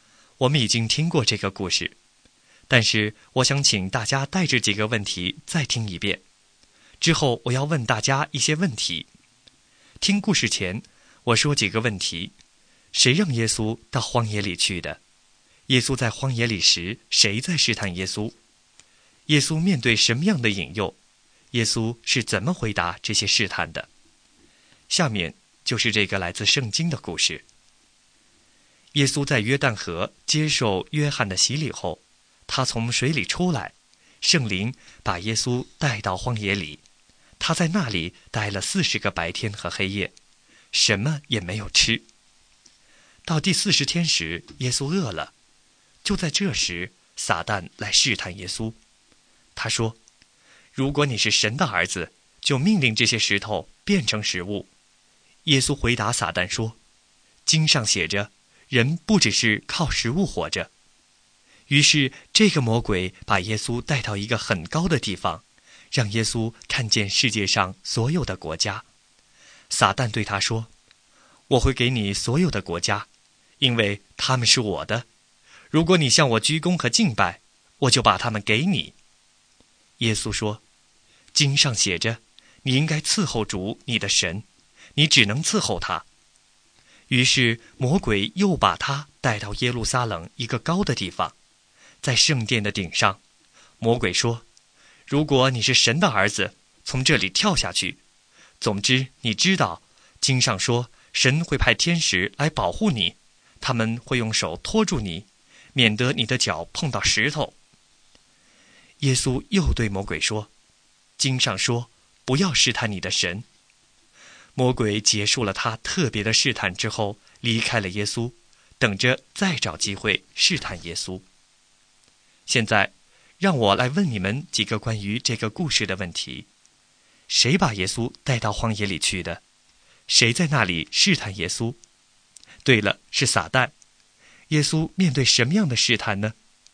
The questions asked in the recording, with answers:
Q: 谁在那里试探耶稣?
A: 对了,是撒旦。